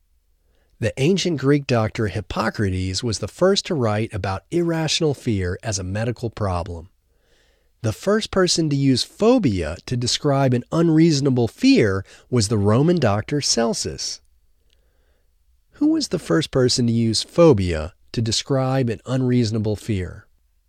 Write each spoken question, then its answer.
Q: Who was the first person to use phobia to describe an unreasonable fear?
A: The first person to use phobia to describe an unreasonable fear was the Roman doctor Celsus.